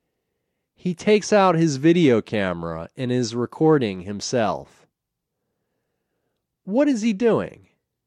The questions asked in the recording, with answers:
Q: What is he doing?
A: He is recording himself.